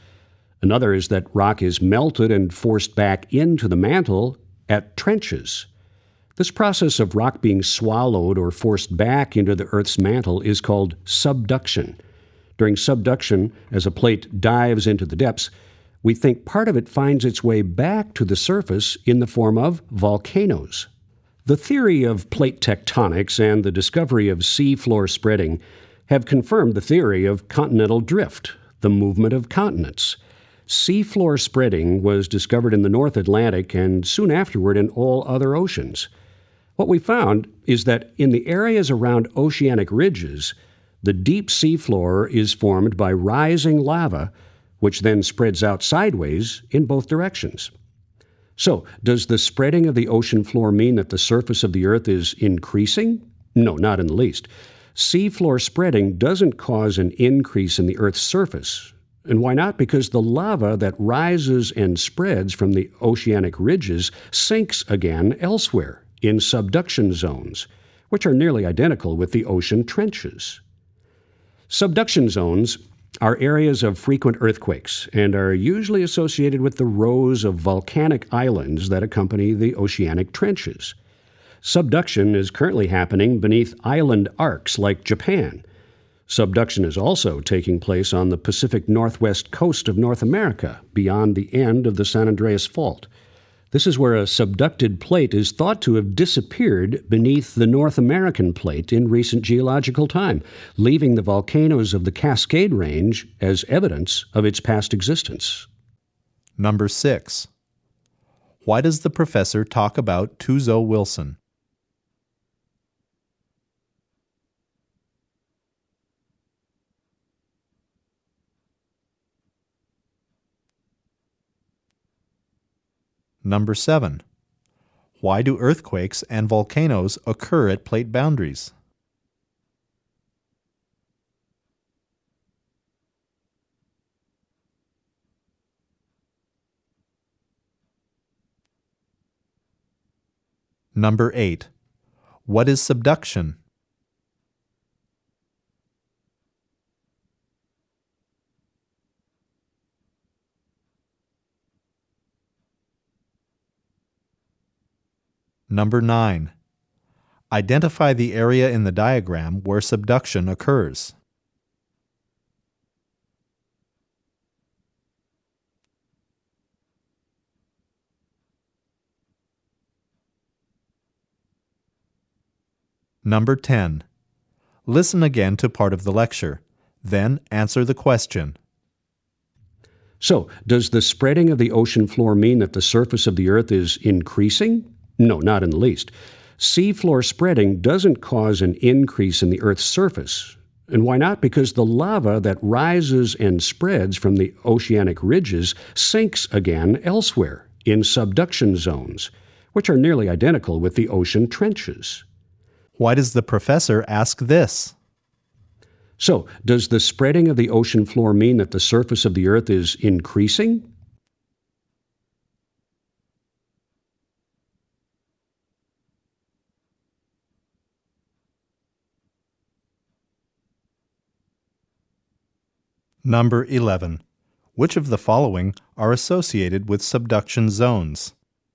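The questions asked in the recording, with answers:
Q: What is subduction?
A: The process of rock being swallowed or forced back into the Earth's mantle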